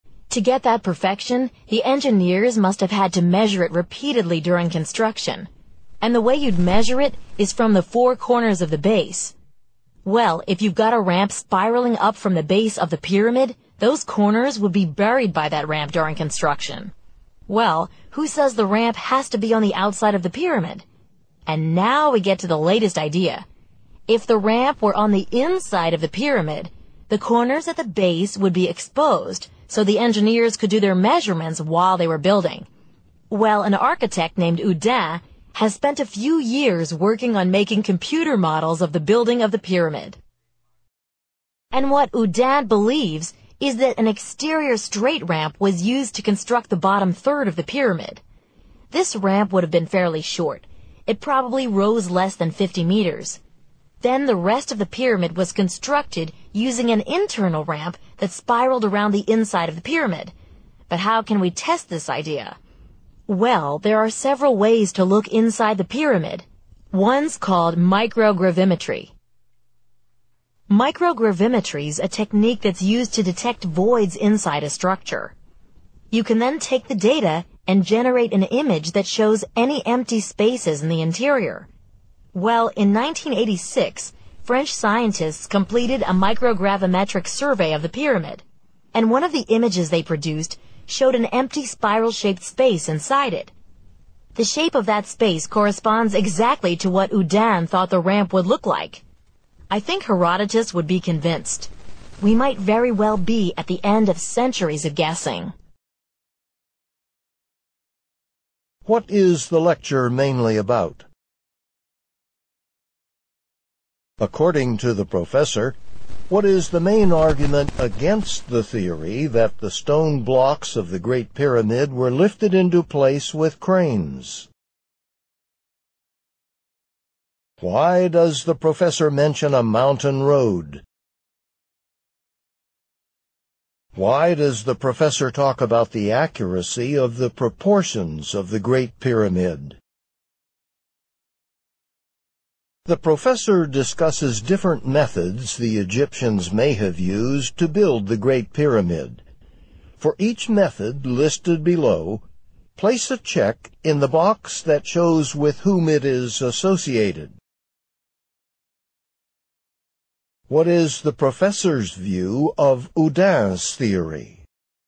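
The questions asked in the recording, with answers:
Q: Why does the professor talk about the accuracy of the proportions of the Great Pyramid?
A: To show that an external spiral ramp is unlikely, because it would have covered the base corners the engineers needed for measuring

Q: What is the professor's view of Houdin's theory?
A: The professor finds it convincing, since the 1986 survey supports it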